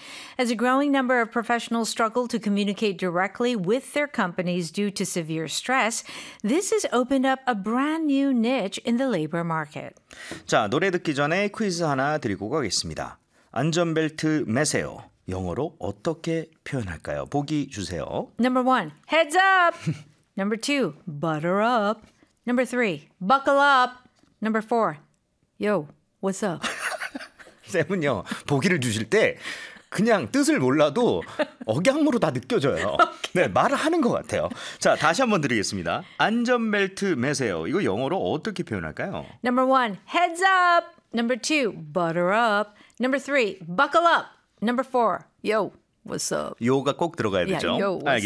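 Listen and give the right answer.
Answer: 3: buckle up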